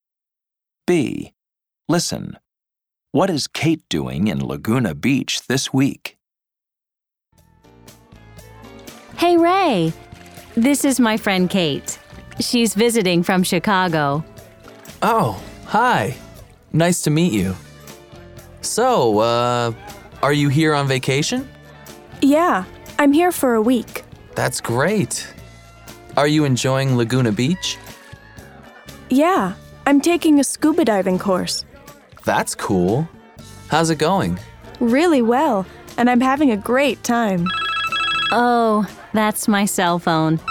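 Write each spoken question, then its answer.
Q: What is Kate doing in Laguna Beach this week?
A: She's on vacation and taking a scuba diving course.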